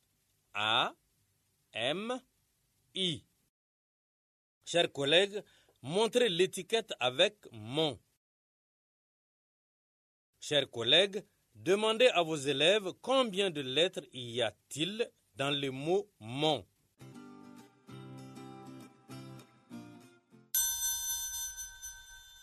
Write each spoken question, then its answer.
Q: Chers collègues, demandez à vos élèves combien de lettres y a-t-il dans le mot « mon ».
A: J'espère que les élèves ont trouvé trois lettres.